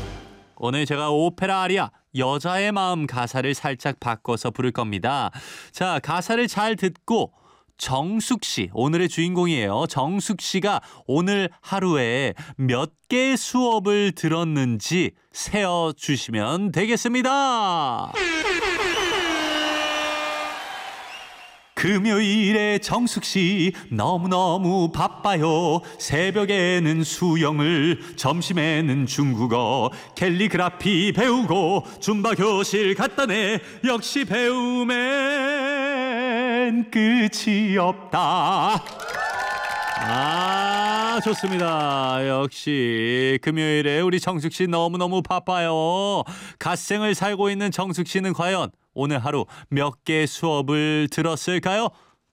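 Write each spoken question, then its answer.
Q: 갓생을 살고 있는 정숙 씨는 과연 오늘 하루 몇 개 수업을 들었을까요?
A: 4개 (수영, 중국어, 캘리그라피, 줌바)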